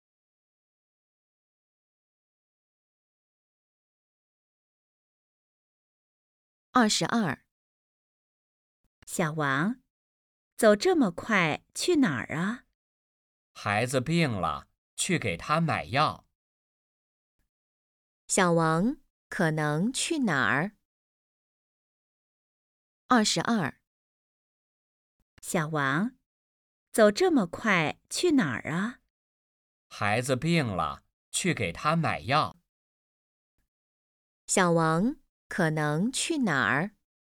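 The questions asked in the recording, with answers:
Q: 小王可能去哪儿?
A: 药店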